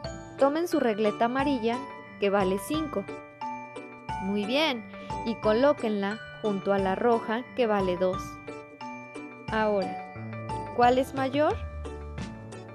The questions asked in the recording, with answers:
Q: Ahora, ¿cuál es mayor?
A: Si contestaste 5, estás en lo correcto.